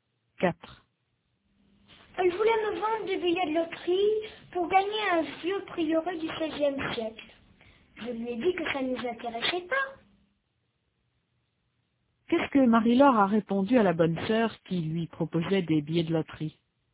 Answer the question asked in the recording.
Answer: Que ça ne les intéressait pas.